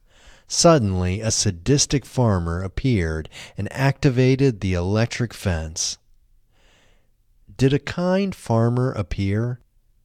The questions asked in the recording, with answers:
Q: Did a kind farmer appear?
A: No, a kind farmer didn't appear.